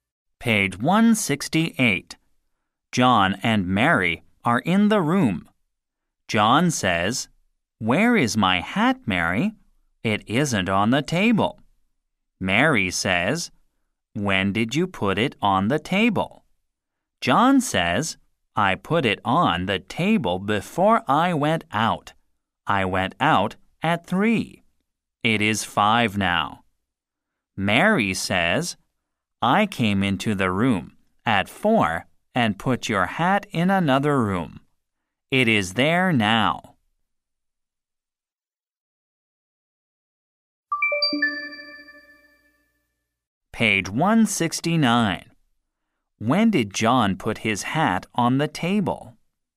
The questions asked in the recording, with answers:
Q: When did John put his hat on the table?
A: He put his hat on the table before he went out.